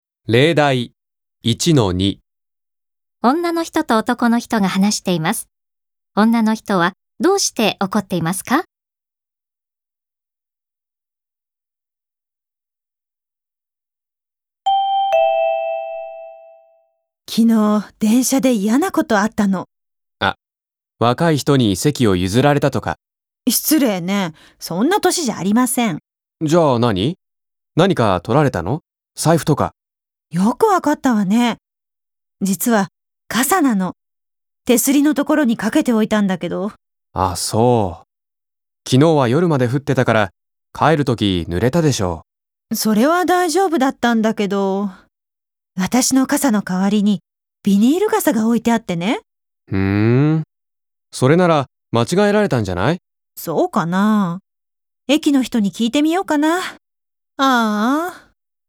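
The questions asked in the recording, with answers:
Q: 女の人はどうして怒っていますか?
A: 電車で傘を取られたから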